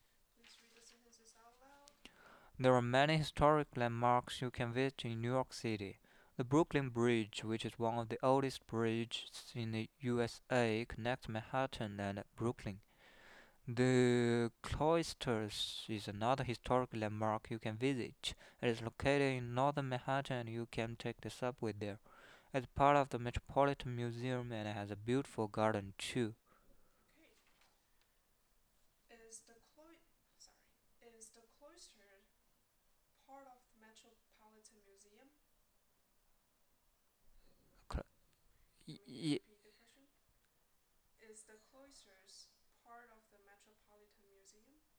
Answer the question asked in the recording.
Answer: Yes, it is. Yes, it is part of the Metropolitan Museum.